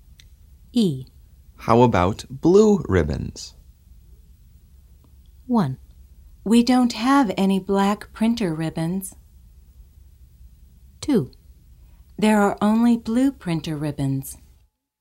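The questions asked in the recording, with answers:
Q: How about blue ribbons?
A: 1: We don't have any black printer ribbons.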